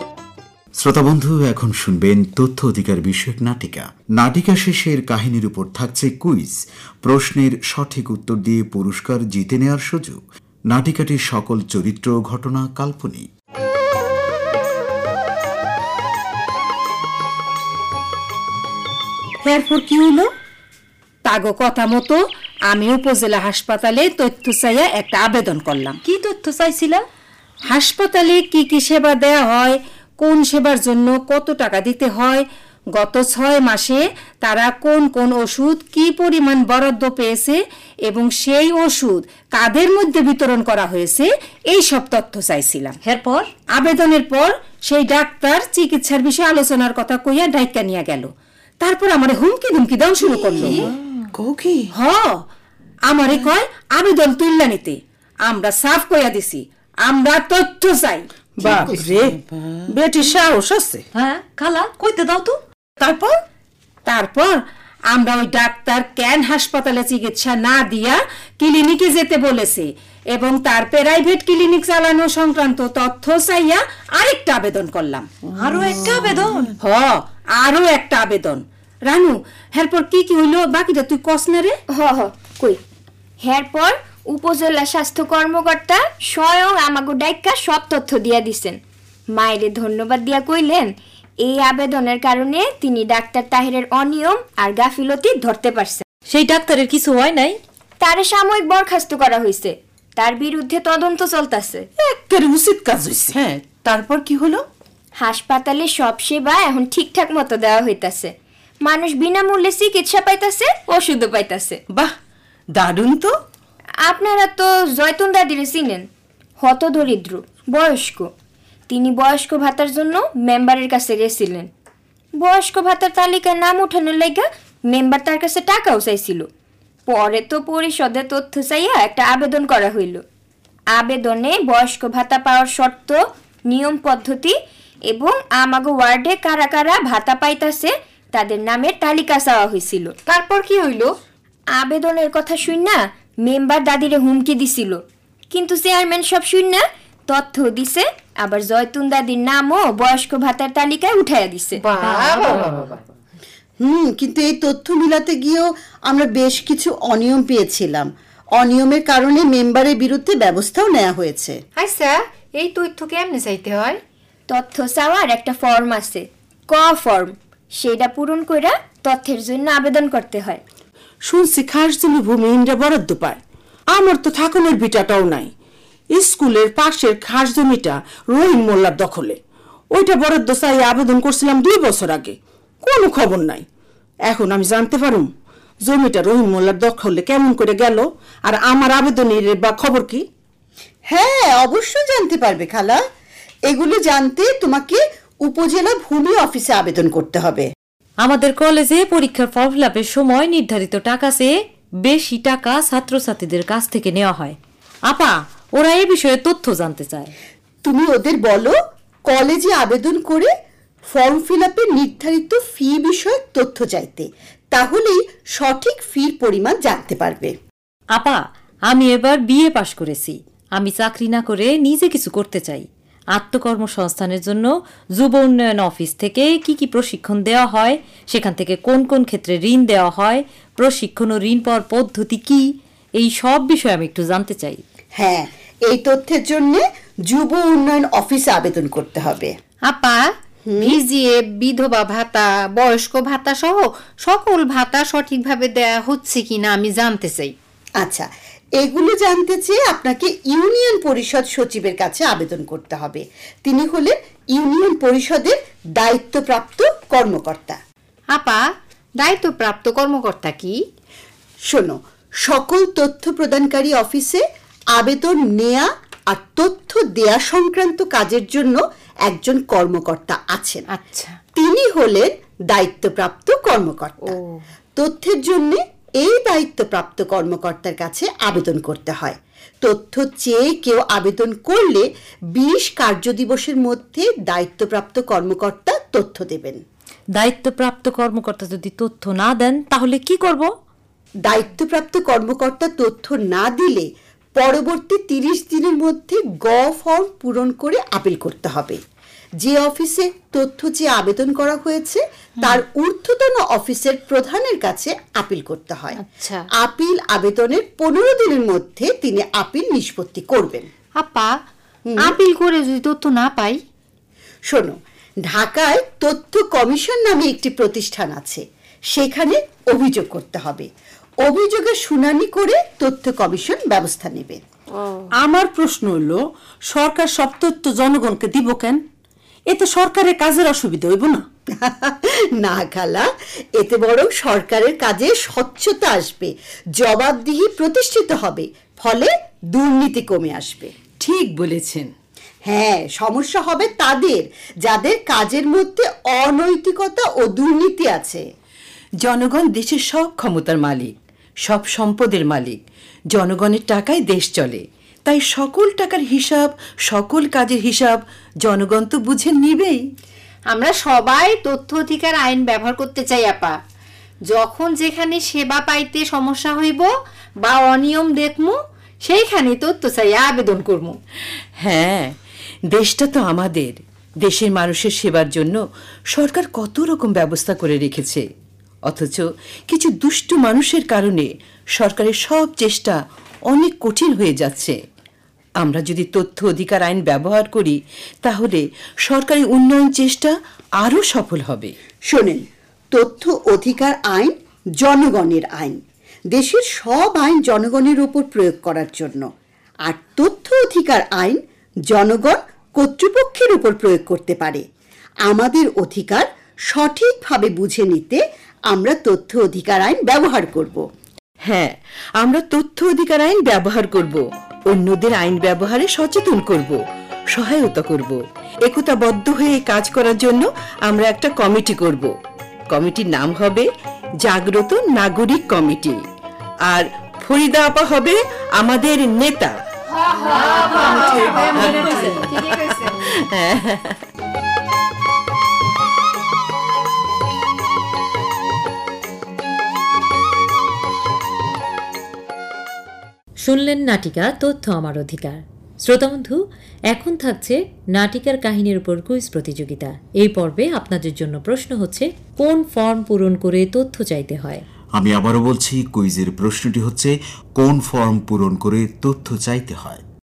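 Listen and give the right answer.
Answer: ক form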